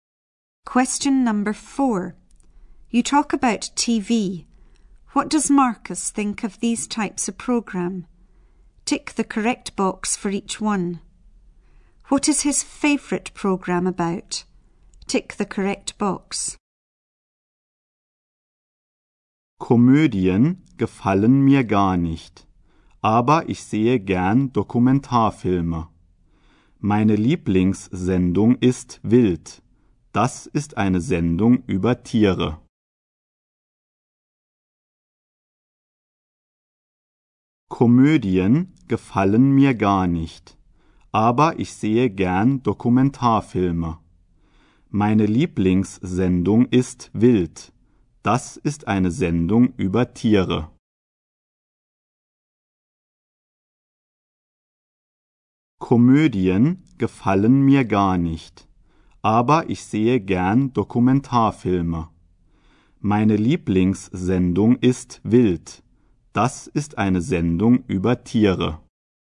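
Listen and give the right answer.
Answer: Animals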